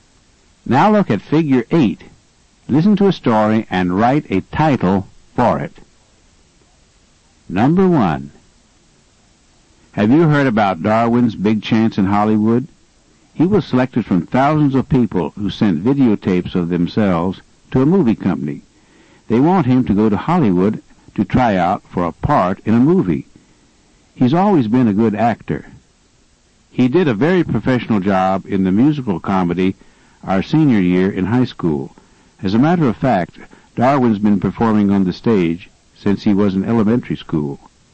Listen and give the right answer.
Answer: Your answer should be something like Darwin in Hollywood or Darwin's Big Chance.